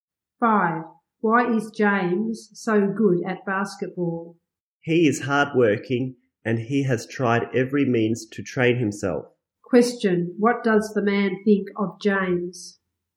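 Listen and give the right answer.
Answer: He is hardworking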